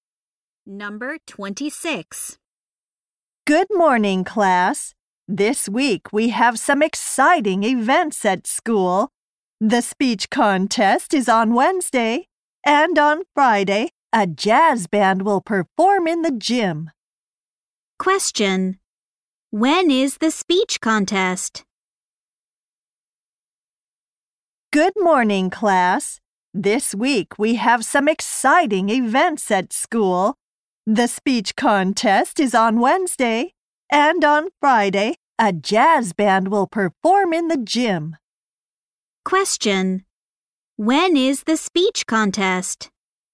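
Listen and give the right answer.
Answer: On Wednesday.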